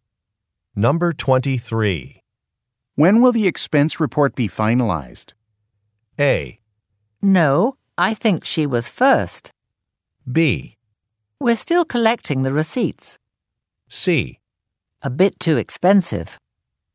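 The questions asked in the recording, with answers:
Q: When will the expense report be finalized?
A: B: We're still collecting the receipts.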